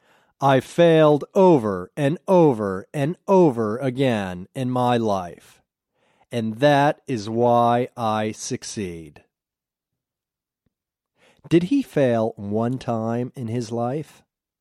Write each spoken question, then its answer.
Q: Did he fail one time in his life?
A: No, he didn't fail one time in his life.